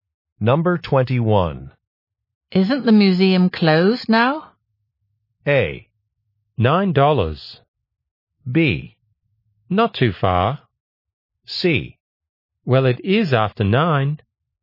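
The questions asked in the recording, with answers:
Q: Isn't the museum closed now?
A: C: Well, it is after 9.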